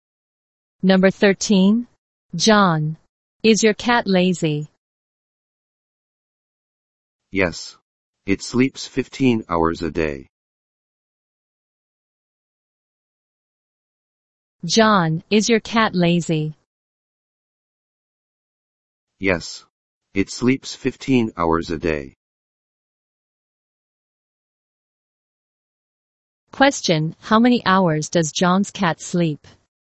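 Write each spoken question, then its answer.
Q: Question, how many hours does John's cat sleep?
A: 15 hours a day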